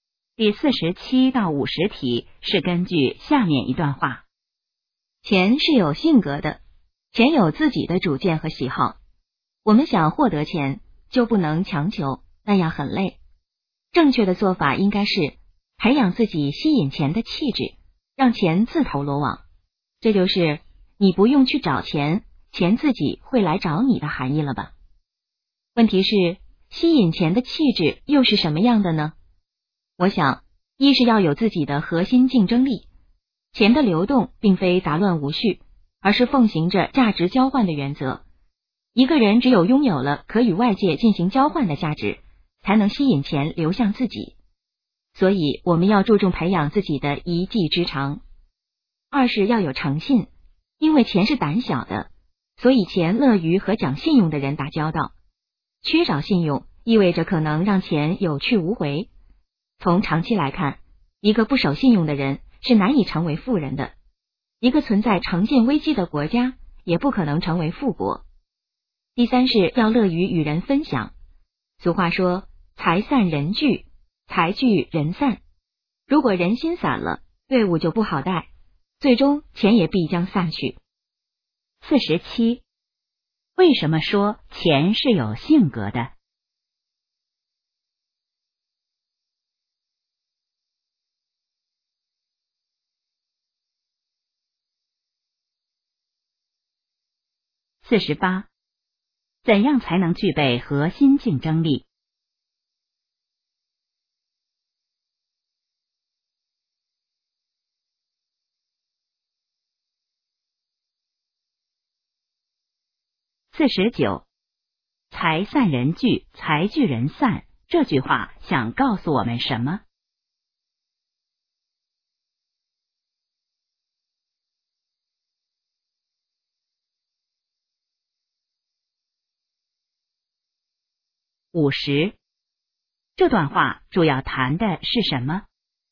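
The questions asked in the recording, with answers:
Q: 为什么说钱是有性格的?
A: 钱有自己的主见和喜好

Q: 怎样才能具备核心竞争力?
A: 培养自己的一技之长

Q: 财散人聚,财聚人散,这句话想告诉我们什么?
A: 要乐于与人分享

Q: 这段话主要谈的是什么?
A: 吸引钱的气质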